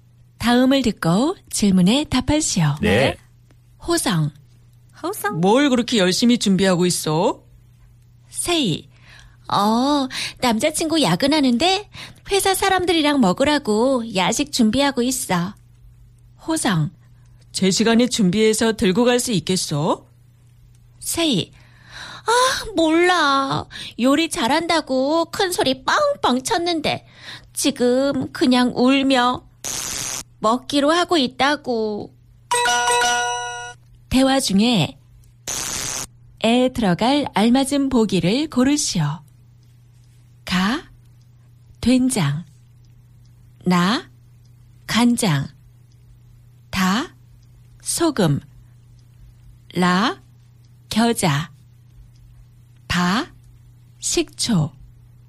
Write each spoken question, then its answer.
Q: 대화 중에 에 들어갈 알맞은 보기를 고르시오.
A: It was la, 겨자, mustard.